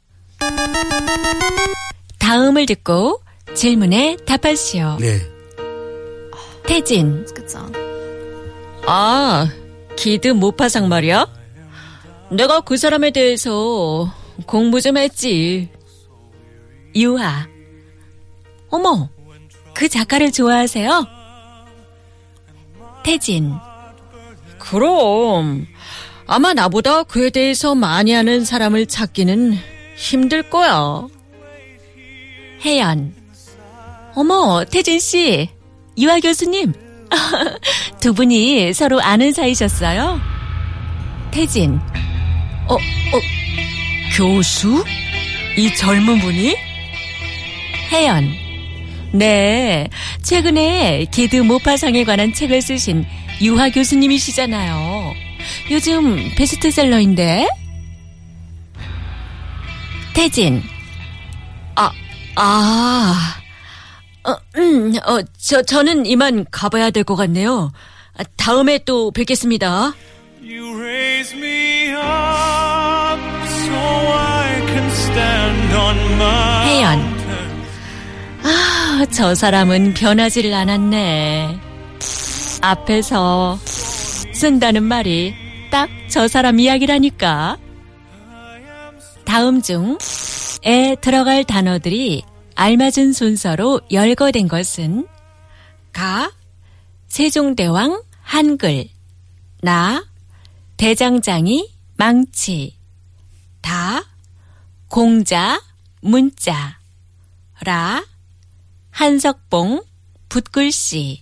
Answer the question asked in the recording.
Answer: Da, Gongjang, Munja.